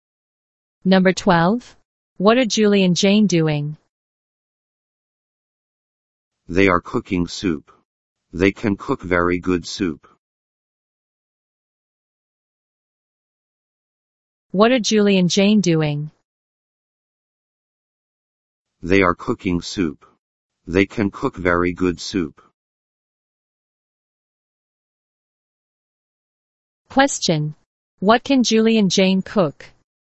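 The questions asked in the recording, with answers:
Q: What can Julie and Jane cook?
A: Very good soup.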